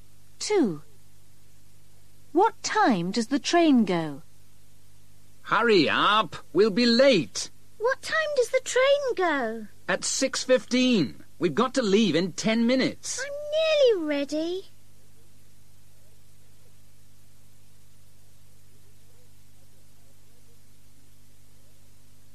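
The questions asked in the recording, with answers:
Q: What time does the train go?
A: At 6:15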